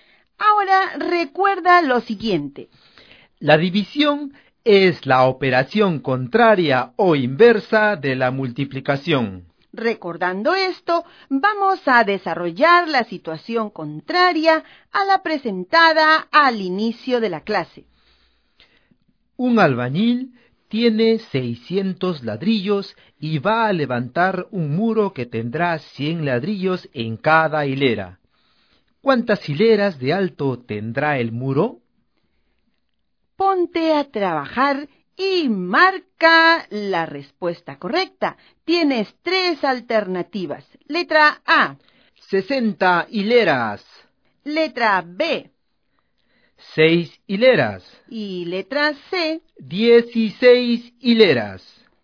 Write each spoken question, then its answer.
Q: ¿Cuántas hileras de alto tendrá el muro?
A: La respuesta correcta es la letra B.